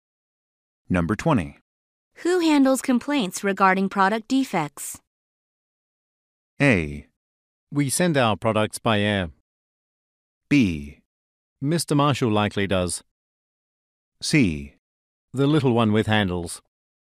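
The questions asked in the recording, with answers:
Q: Who handles complaints regarding product defects?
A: B: Mr. Marshall likely does.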